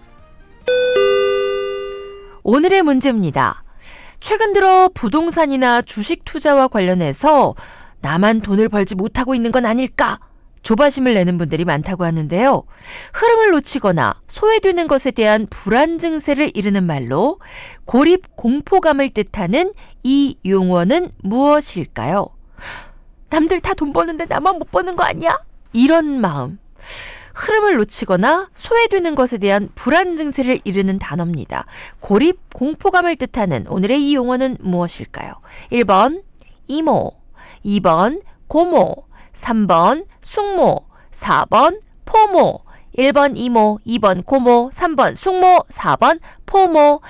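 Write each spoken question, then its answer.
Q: 고립 공포감을 뜻하는 오늘의 이 용어는 무엇일까요?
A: 4: 포모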